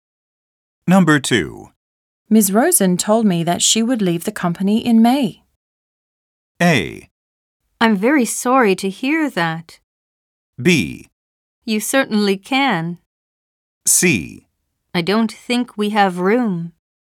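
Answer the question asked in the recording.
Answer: A: I'm very sorry to hear that.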